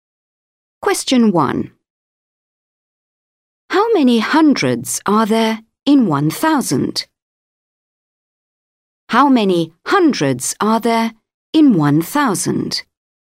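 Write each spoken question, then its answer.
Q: How many hundreds are there in 1,000?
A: 10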